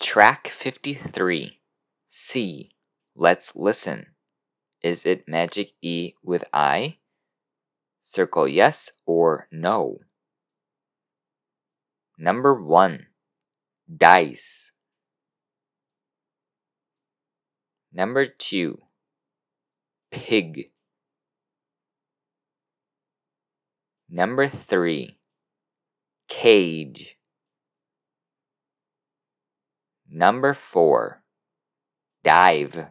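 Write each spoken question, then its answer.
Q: Number 1, Dice.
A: yes

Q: Number 2, Pig.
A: no

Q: Number 3, Cage.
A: no

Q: Number 4, Dive.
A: yes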